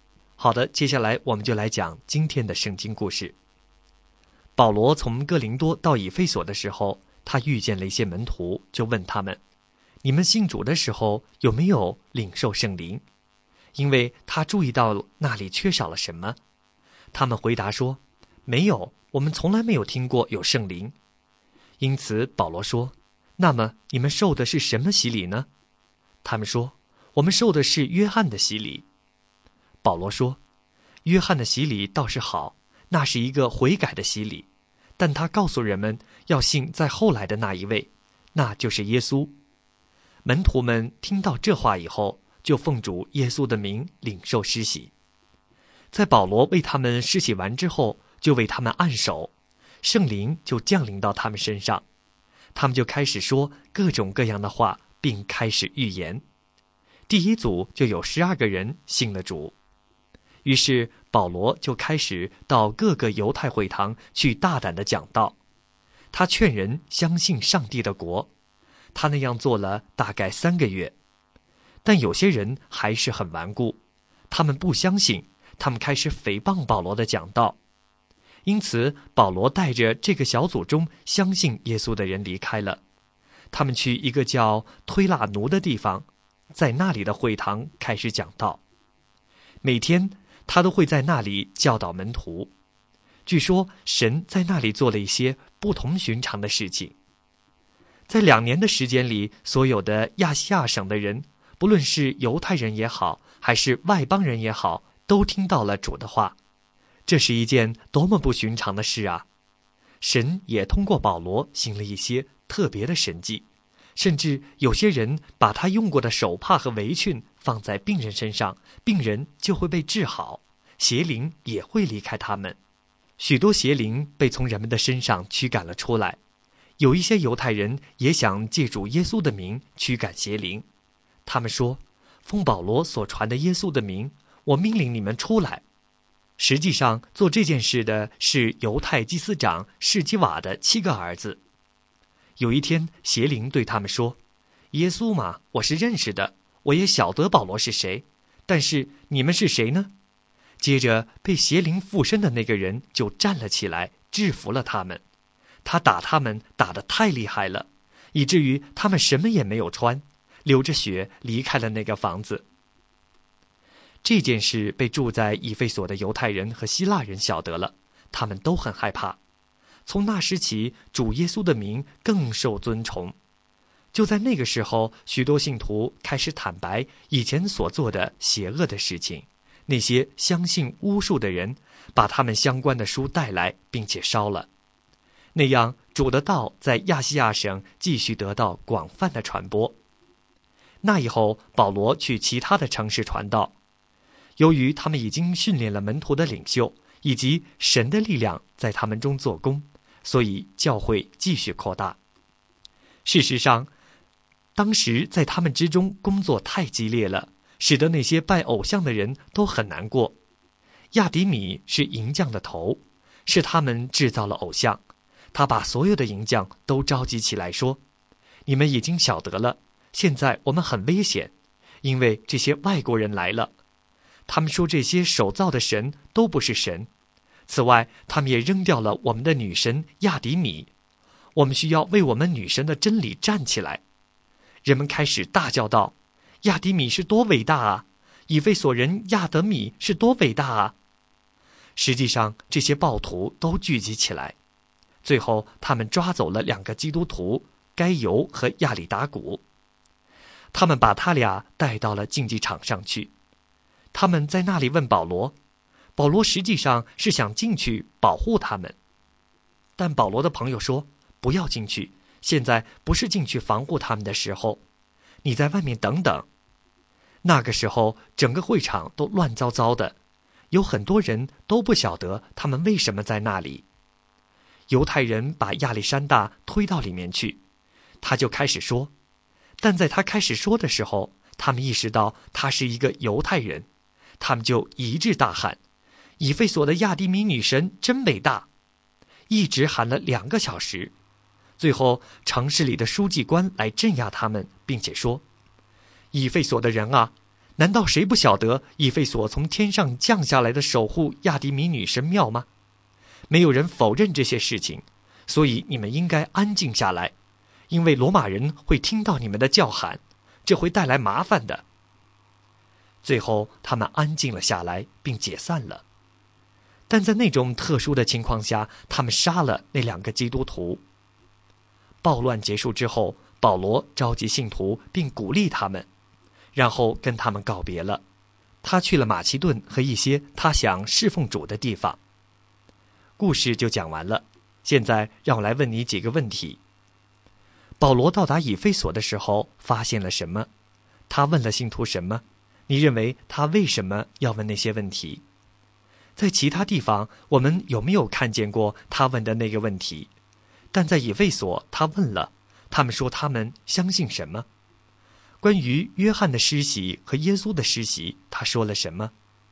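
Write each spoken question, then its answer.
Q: 保罗到达以弗所的时候发现了什么?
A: 一些门徒,他们没有领受圣灵

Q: 他问了信徒什么?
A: 你们信主的时候有没有领受圣灵?

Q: 他们说他们相信什么?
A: 他们受的是约翰的洗礼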